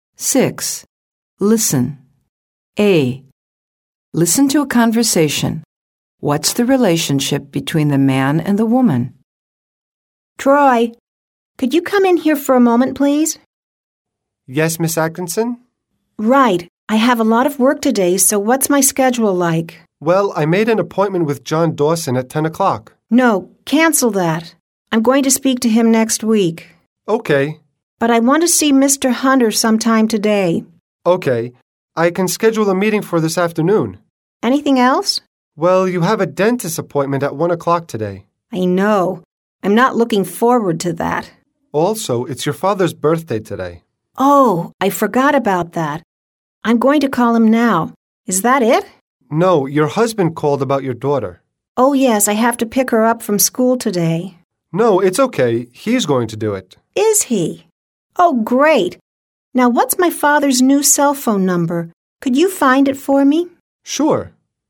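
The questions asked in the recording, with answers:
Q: What's the relationship between the man and the woman?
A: The man is the woman's assistant (secretary); she is his boss.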